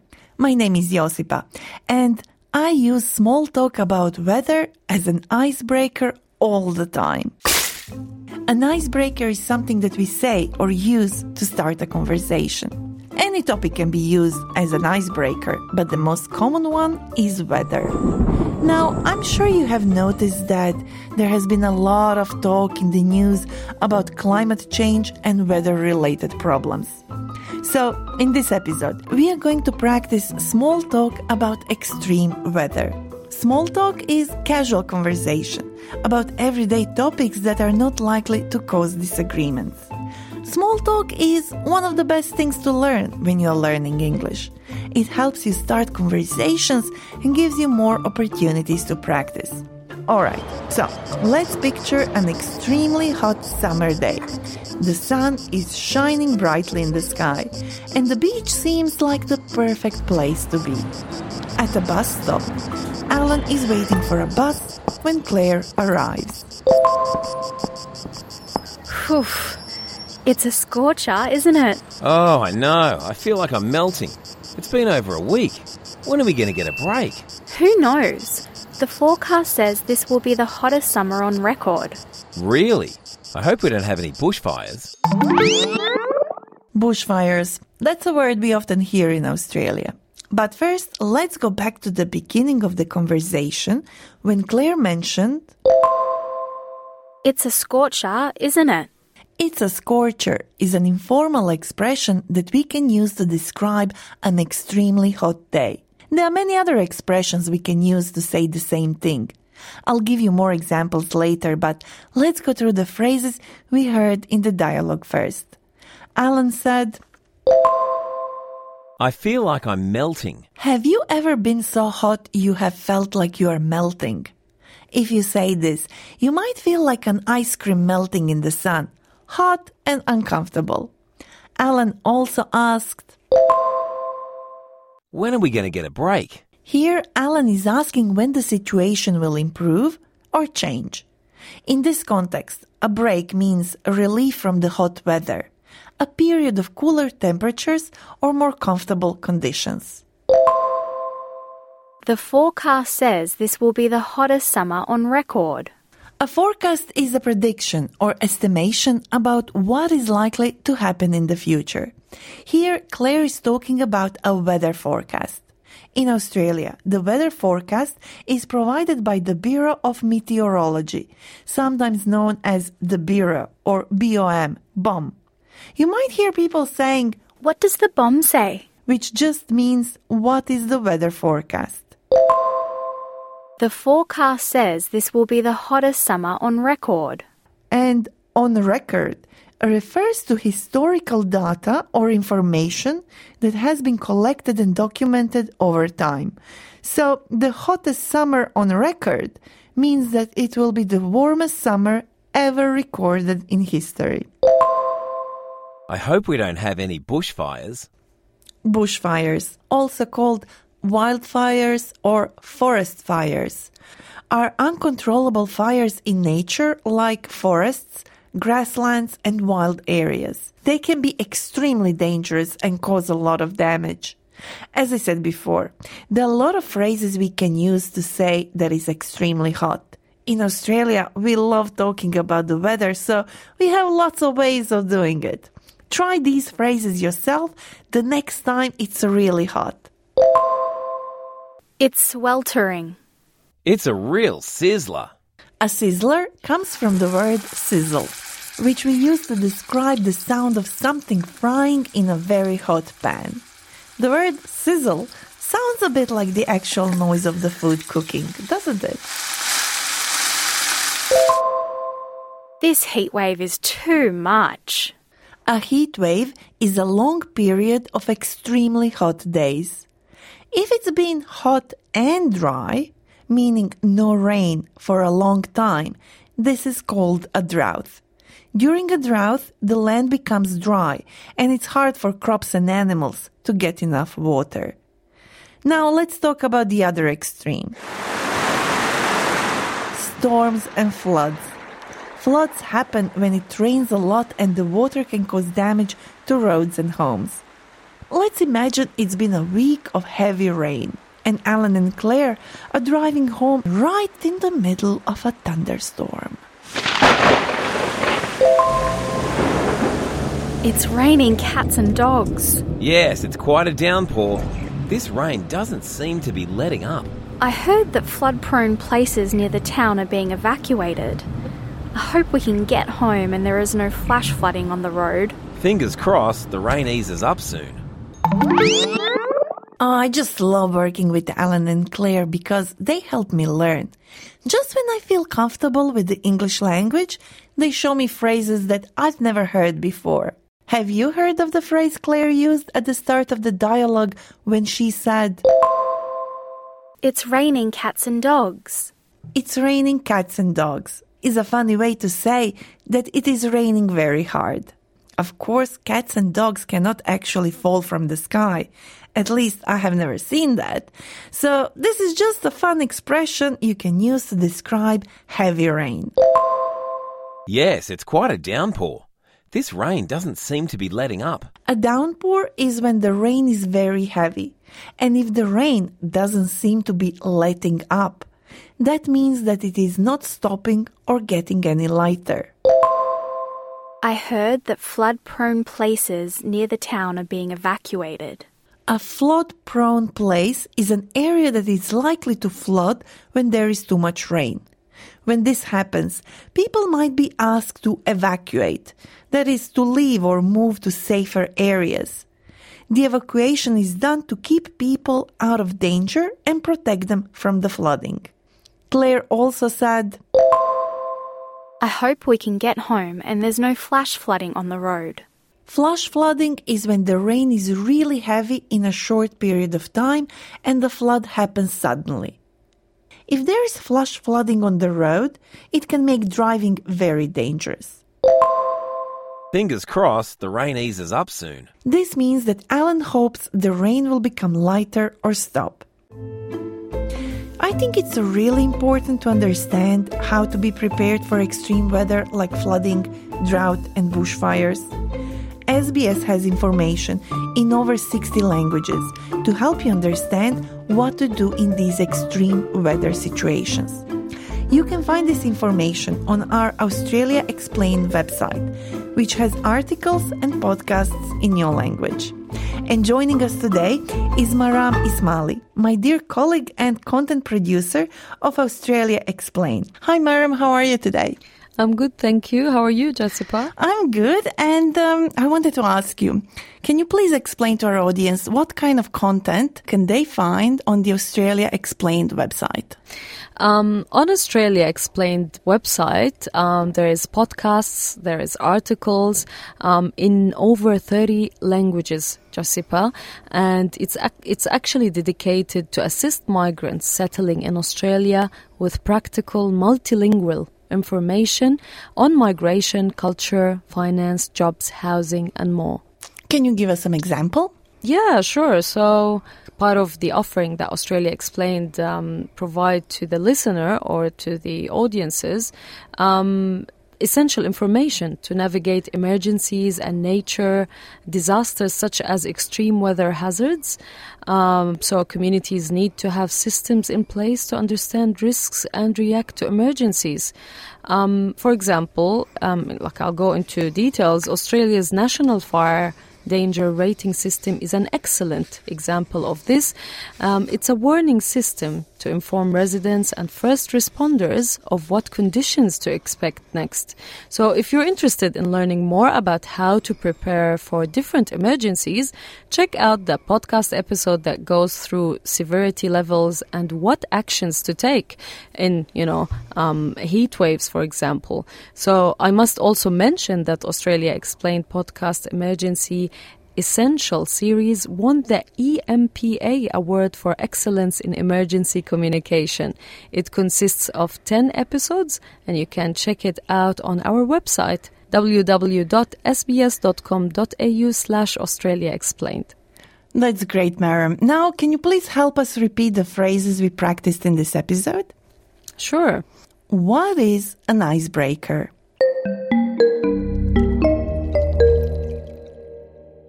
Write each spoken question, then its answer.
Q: What is an icebreaker?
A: An icebreaker is something that we say or do to start a conversation with someone we don't know.